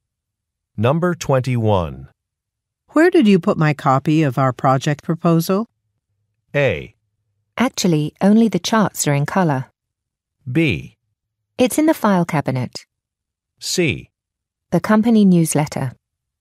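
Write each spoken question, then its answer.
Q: Where did you put my copy of our project proposal?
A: B: It's in the file cabinet.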